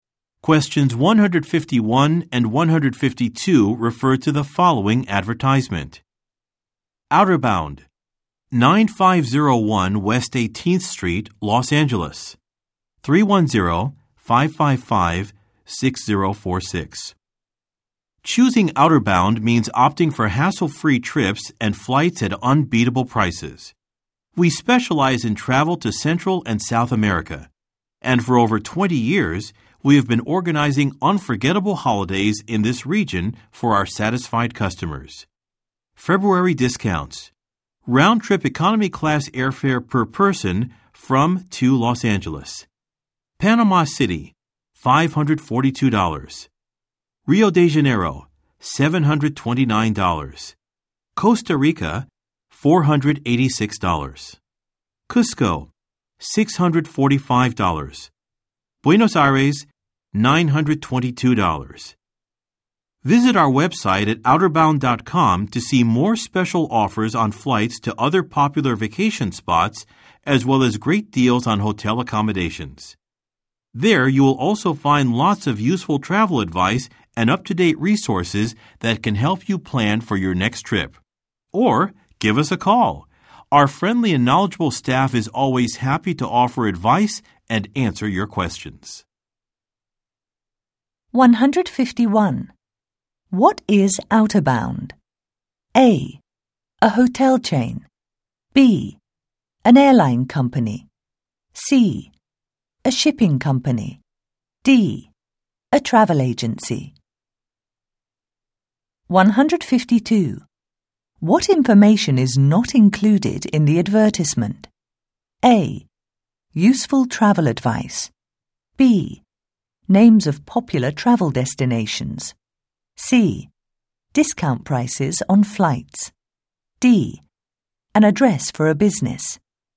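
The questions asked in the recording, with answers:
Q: What is outer bound?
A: D: A travel agency.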